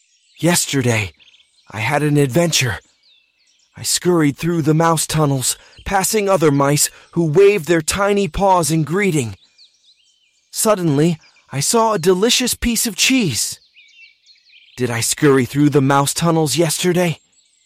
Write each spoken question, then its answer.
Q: Did I scurry through the mouse tunnels yesterday?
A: Yes, I did. Yesterday, I scurried through the mouse tunnels.